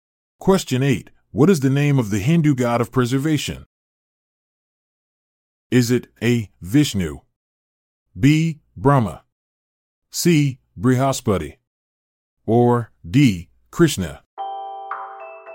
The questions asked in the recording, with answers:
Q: What is the name of the Hindu god of preservation?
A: The answer is A. Vishnu.